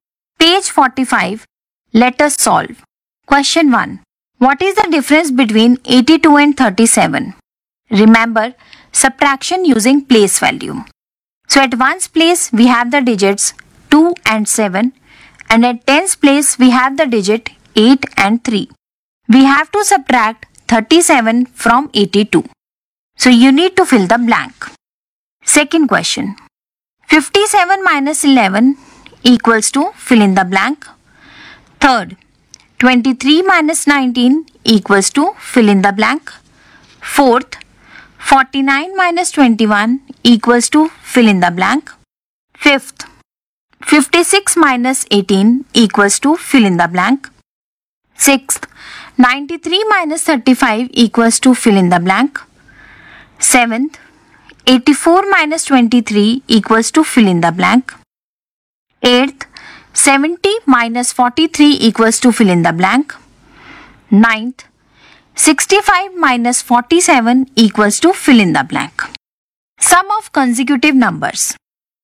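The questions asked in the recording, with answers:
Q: 65 minus 47 equals to fill in the blank.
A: 18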